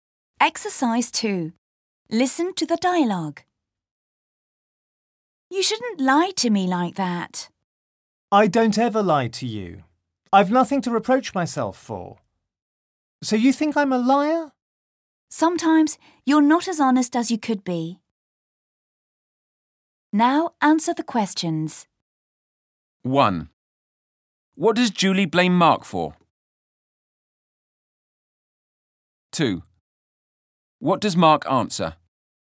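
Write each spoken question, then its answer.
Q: What does Julie blame Mark for?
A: For lying to her

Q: What does Mark answer?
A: He never lies to her and has nothing to reproach himself for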